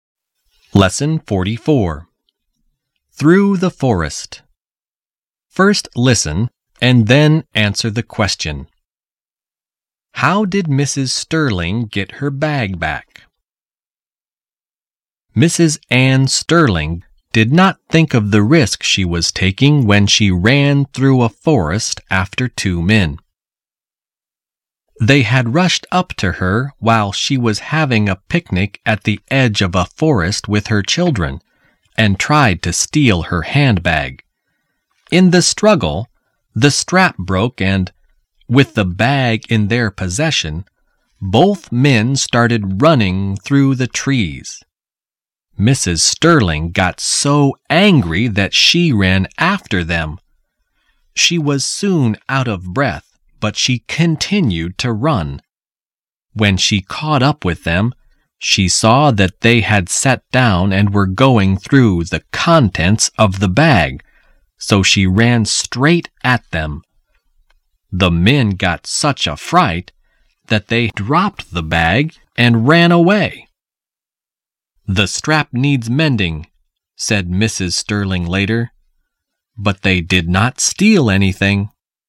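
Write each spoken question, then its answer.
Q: How did Mrs. Sterling get her bag back?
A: She ran straight at the two men, and they were so frightened that they dropped the bag and ran away.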